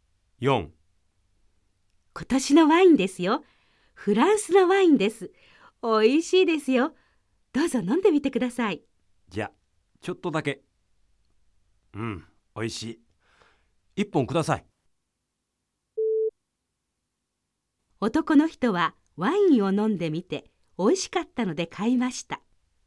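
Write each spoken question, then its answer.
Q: 男の人はワインを飲んでみておいしかったので買いました。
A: ○(正しい)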